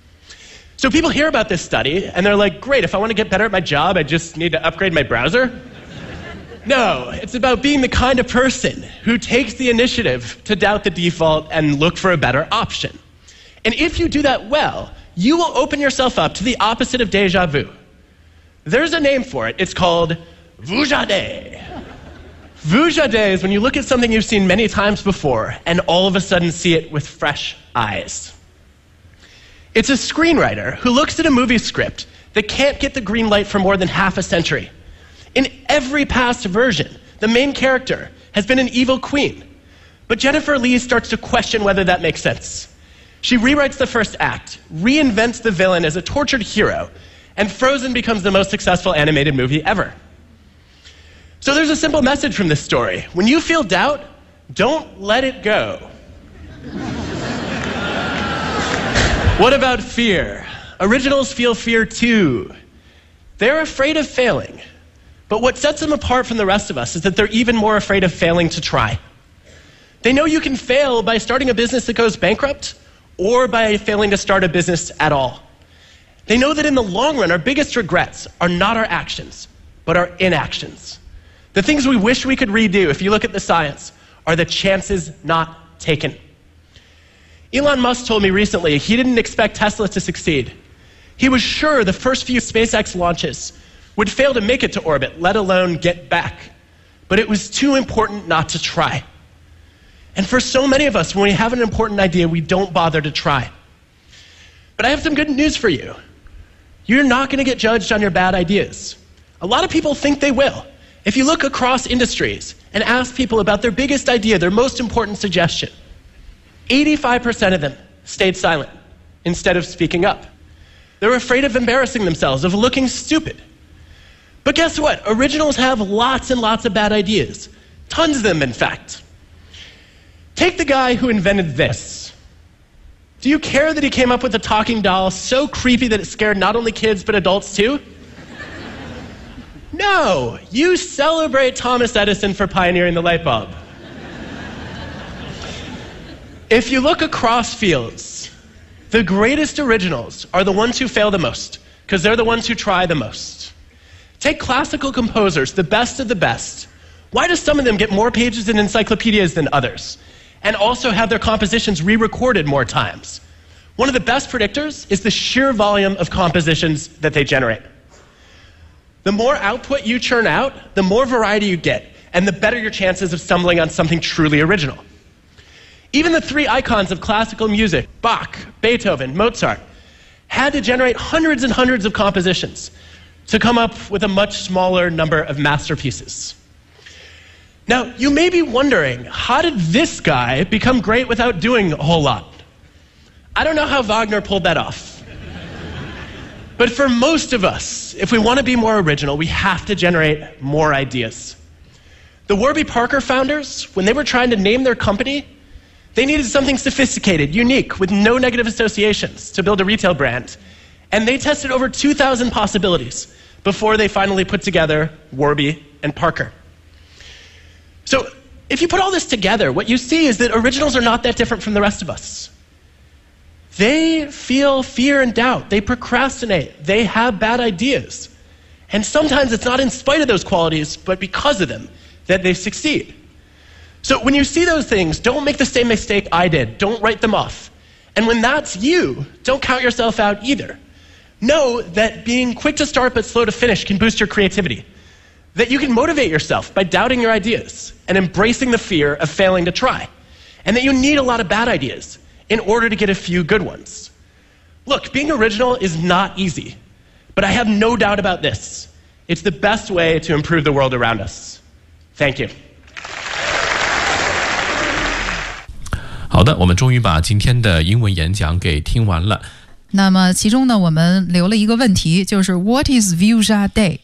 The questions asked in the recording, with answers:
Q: What is Vuja Day?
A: Vuja Day is when you look at something you've seen many times before and all of a sudden see it with fresh eyes.